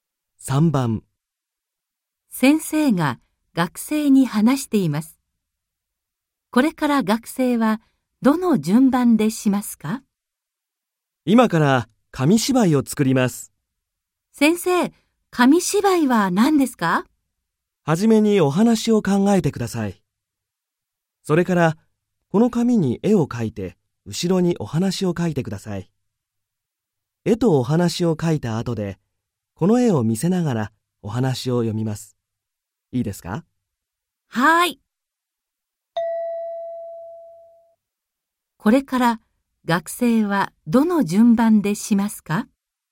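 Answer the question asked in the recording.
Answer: お話を考える→紙に絵を描く→後ろにお話を書く→絵を見せながらお話を読む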